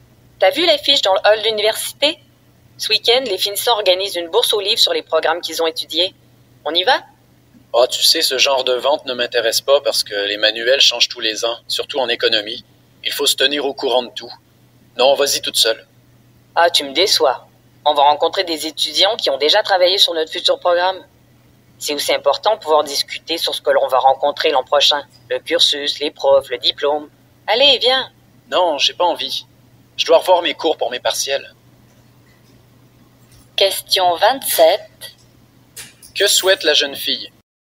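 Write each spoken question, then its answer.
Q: Que souhaite la jeune fille?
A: Qu'il l'accompagne à la bourse aux livres organisée par les finissants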